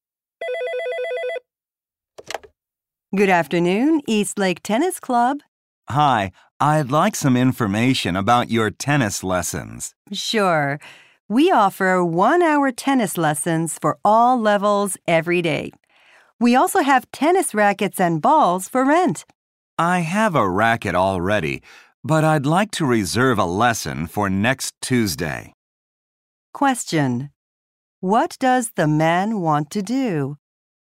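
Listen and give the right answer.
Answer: Reserve a tennis lesson for next Tuesday.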